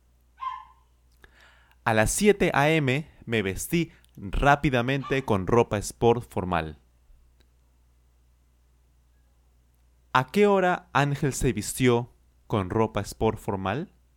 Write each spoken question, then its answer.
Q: ¿A qué hora Ángel se vistió con ropa sport formal?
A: Claro, a las 7 a.m. Ángel se vistió rápidamente con ropa sport formal.